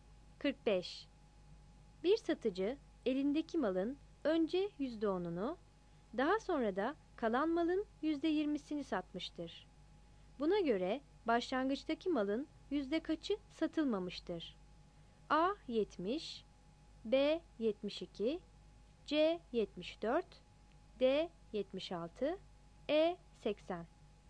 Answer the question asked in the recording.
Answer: 45 B